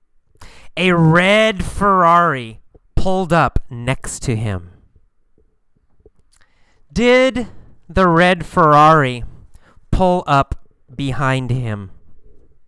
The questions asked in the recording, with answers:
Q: Did the red Ferrari pull up behind him?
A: No, not behind him. The red Ferrari pulled up next to him.